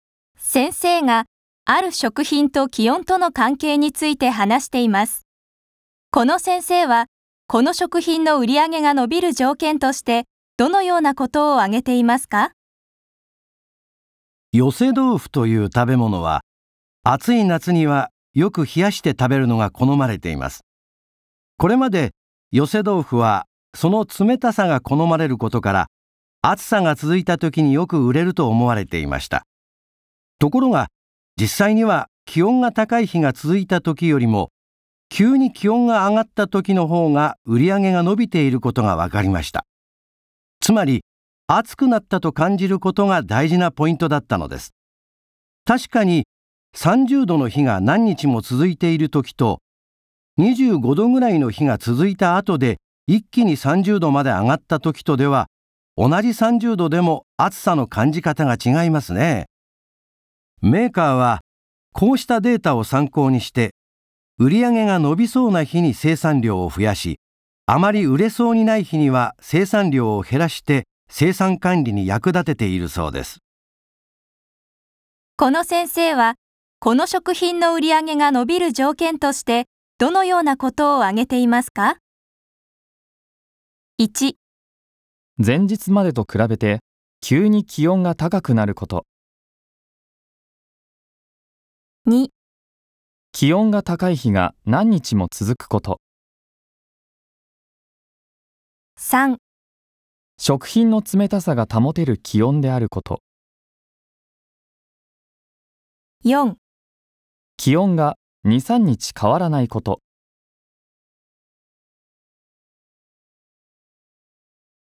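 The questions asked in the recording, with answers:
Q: この先生はこの食品の売り上げが伸びる条件としてどのようなことを挙げていますか?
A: 1: 前日までと比べて急に気温が高くなること。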